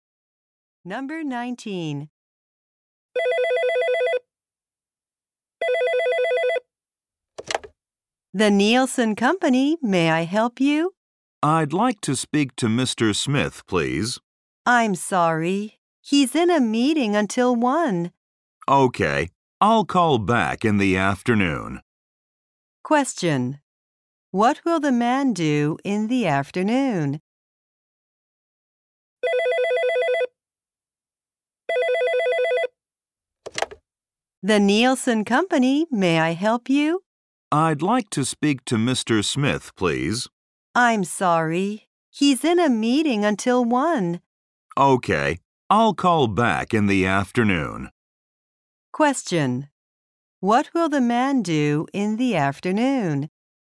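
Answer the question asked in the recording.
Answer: Call Mr. Smith again.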